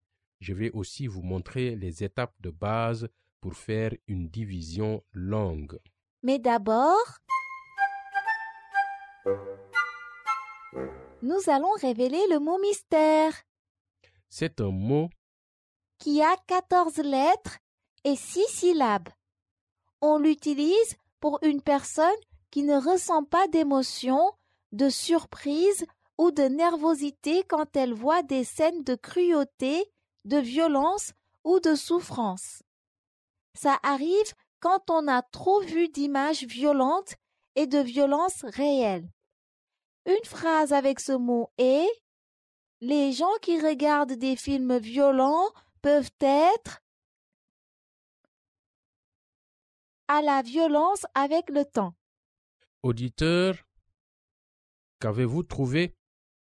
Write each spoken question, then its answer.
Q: Auditeur, qu'avez-vous trouvé?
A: Le mot mystère est désensibiliser.